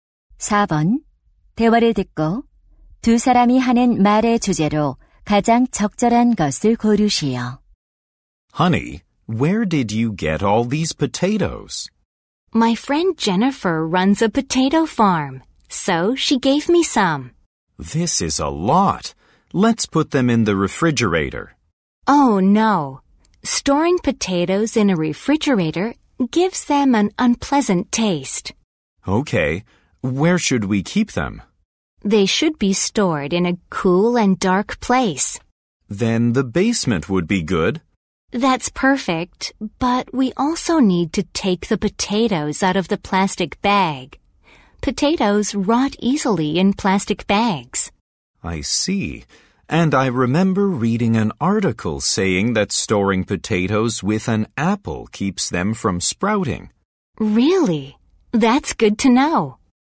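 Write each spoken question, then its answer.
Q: 대화를 듣고 두 사람이 하는 말의 주제로 가장 적절한 것을 고르시오.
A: 감자를 보관하는 방법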